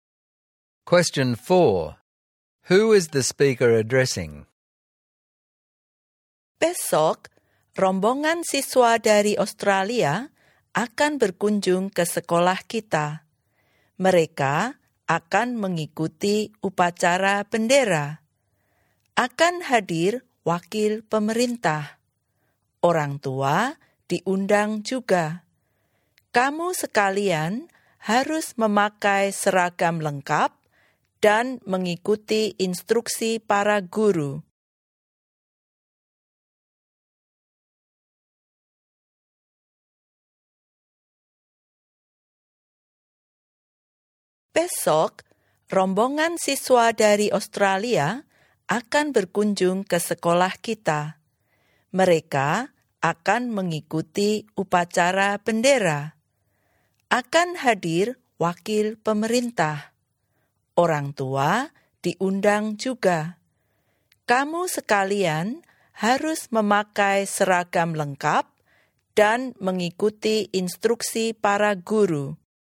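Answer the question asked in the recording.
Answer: Students at the school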